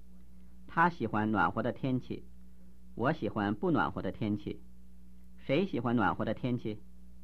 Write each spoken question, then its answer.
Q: 谁喜欢暖和的天气?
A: 他喜欢暖和的天气。